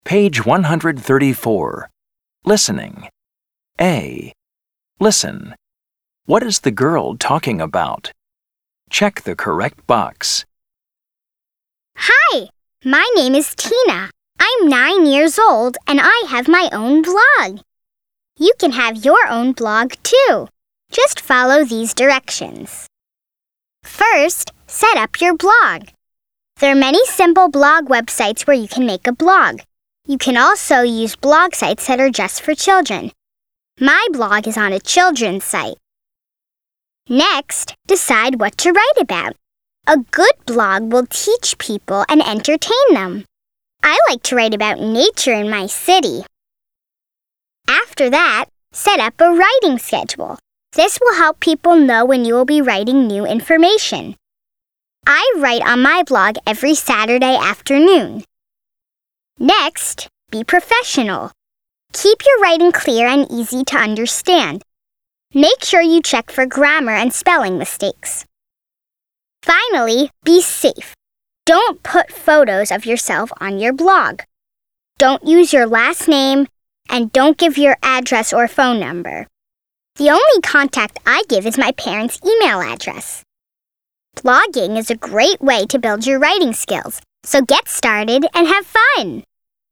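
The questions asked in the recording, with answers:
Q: What is the girl talking about?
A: How to start and run your own blog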